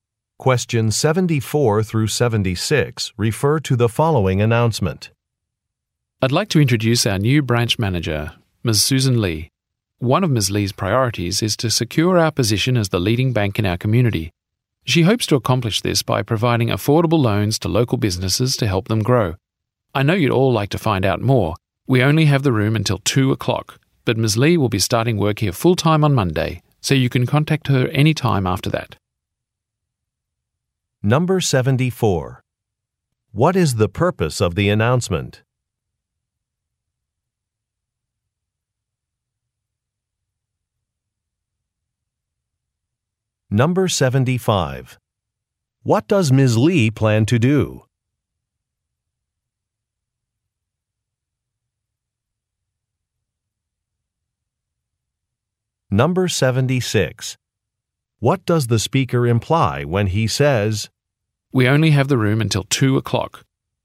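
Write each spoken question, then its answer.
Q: What is the purpose of the announcement?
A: To introduce a new branch manager

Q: What does Ms. Lee plan to do?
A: Provide affordable loans to local businesses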